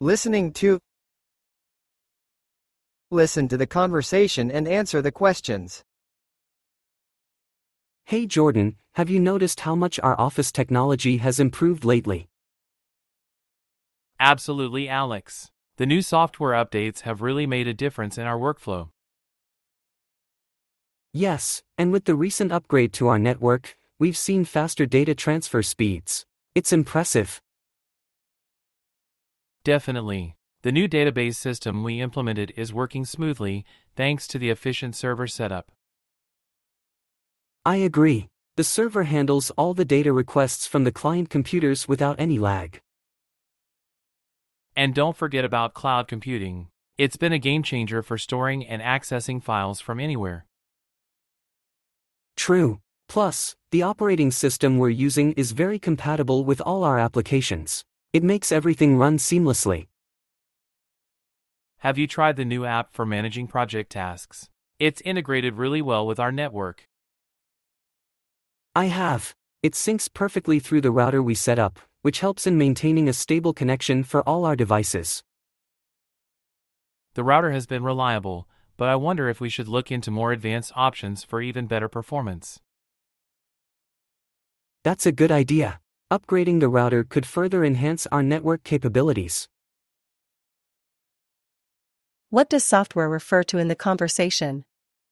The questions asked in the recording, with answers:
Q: What does software refer to in the conversation?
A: Programs and applications running on computers.